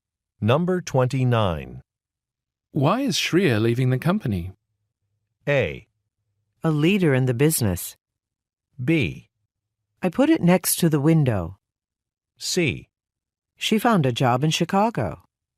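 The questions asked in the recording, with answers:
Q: Why is Shreya leaving the company?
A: C: She found a job in Chicago.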